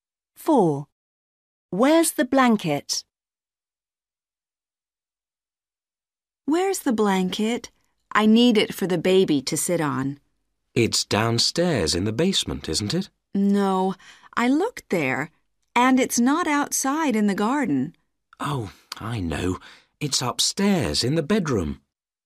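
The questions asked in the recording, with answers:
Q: Where's the blanket?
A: Upstairs in the bedroom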